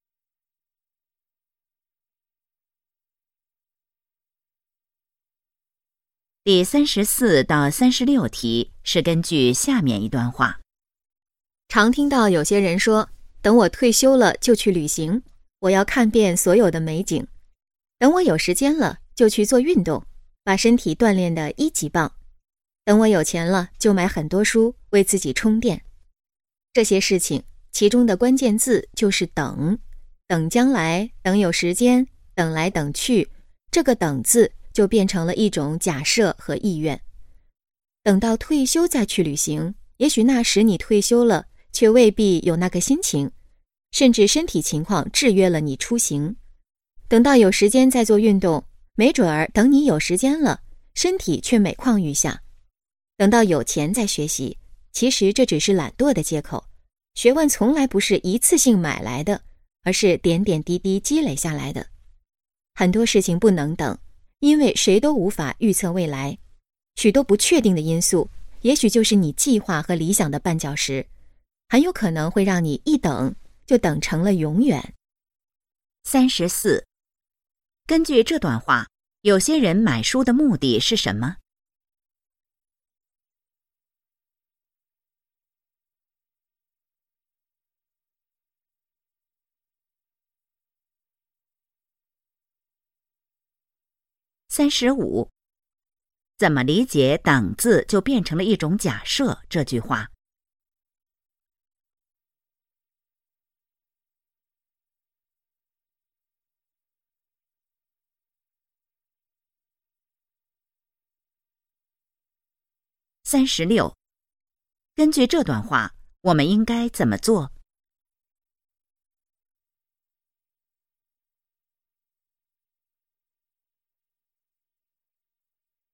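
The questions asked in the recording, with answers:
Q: 根据这段话,有些人买书的目的是什么?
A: 为自己充电

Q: 怎么理解"等"字就变成了一种假设这句话?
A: 一直等下去,计划可能永远无法实现

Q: 我们应该怎么做?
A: 很多事情不能等,要马上去做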